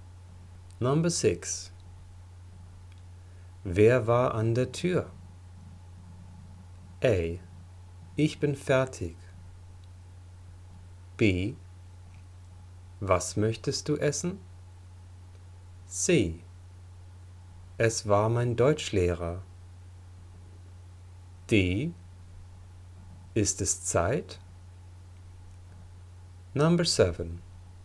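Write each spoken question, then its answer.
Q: Wer war an der Tür?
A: C: Es war mein Deutschlehrer.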